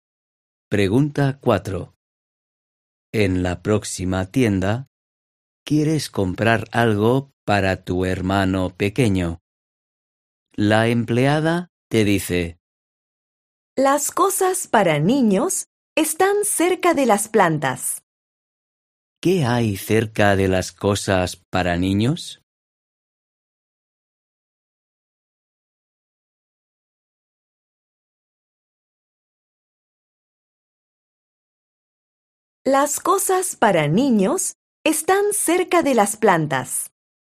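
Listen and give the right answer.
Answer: las plantas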